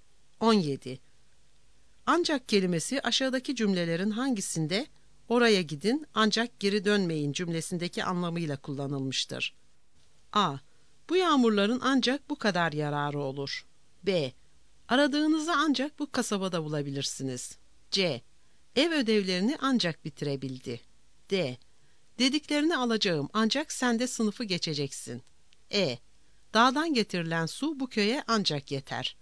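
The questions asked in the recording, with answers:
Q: Ancak kelimesi aşağıdaki cümlelerin hangisinde oraya gidin ancak geri dönmeyin cümlesindeki anlamıyla kullanılmıştır?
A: D: Dediklerini alacağım ancak sen de sınıfı geçeceksin.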